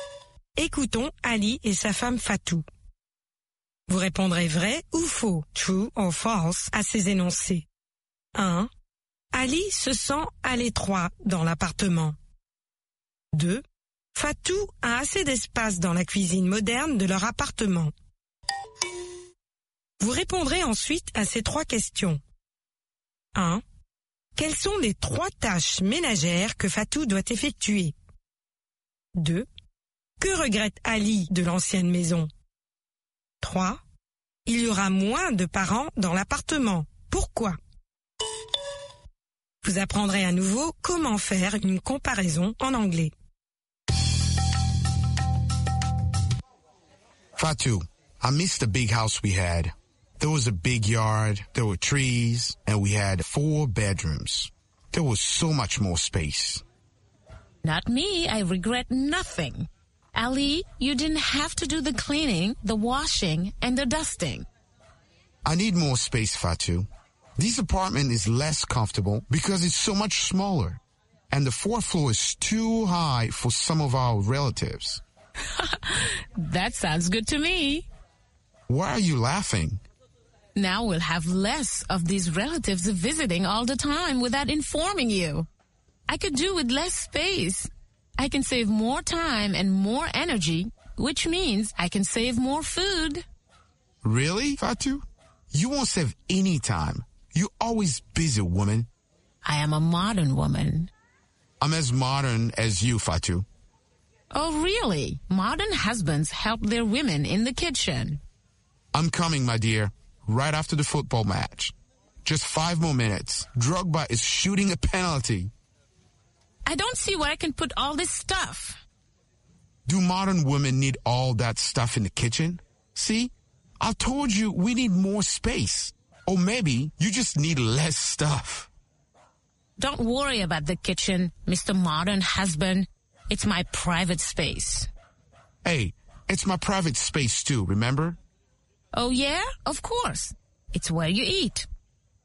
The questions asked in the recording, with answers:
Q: Ali se sent à l'étroit dans l'appartement.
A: L'énoncé 1 est vrai. Ali se sent à l'étroit dans l'appartement.

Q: Fatou a assez d'espace dans la cuisine moderne de leur appartement.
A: L'énoncé 2 est faux. Fatou a assez d'espace dans la cuisine moderne de leur appartement.

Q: Quelles sont les trois tâches ménagères que Fatou doit effectuer?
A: Le ménage, la lessive et l'époustage.

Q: Que regrette Ali de l'ancienne maison?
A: La cour, les arbres, les 4 chambres et l'espace.

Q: Il y aura moins de parents dans l'appartement. Pourquoi?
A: Parce qu'il sera plus difficile de monter au 4e étage.